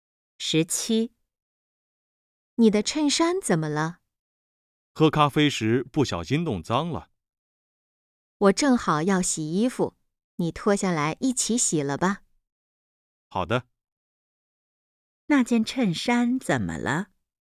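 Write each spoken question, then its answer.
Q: 那件衬衫怎么了?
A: 喝咖啡时弄脏了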